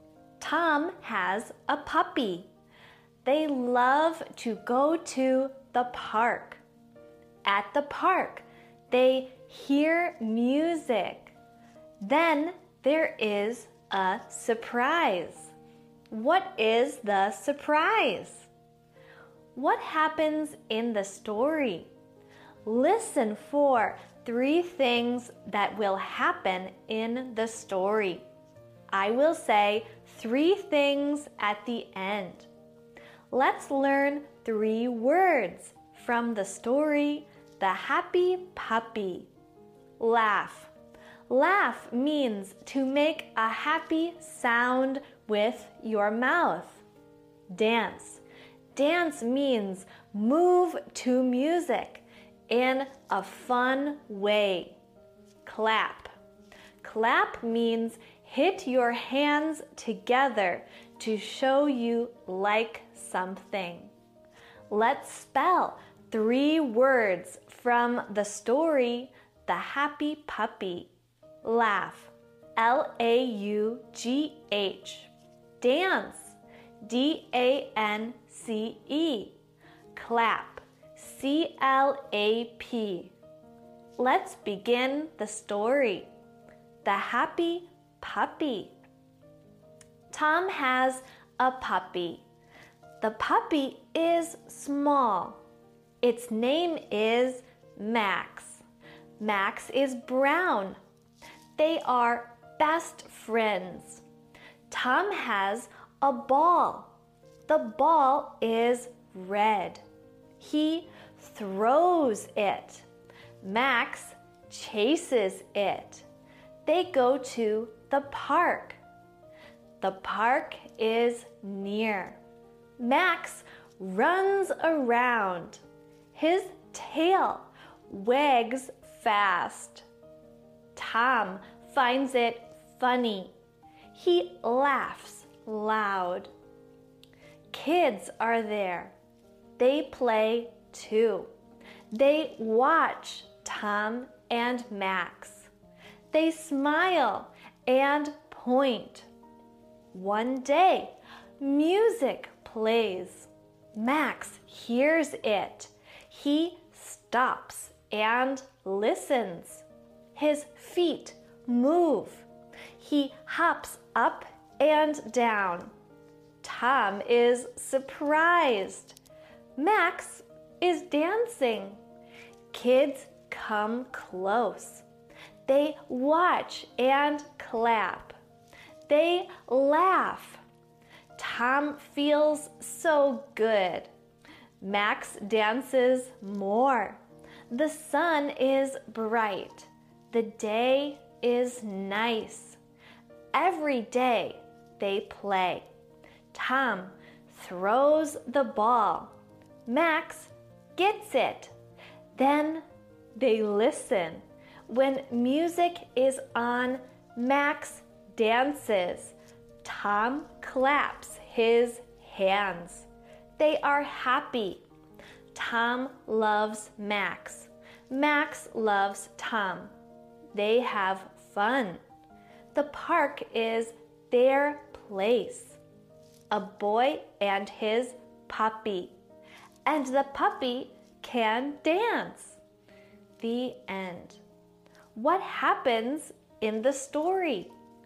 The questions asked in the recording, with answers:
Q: What happens in the story?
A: Tom and Max the puppy go to the park. Tom and Max the puppy hear music at the park. Max the puppy dances at the park.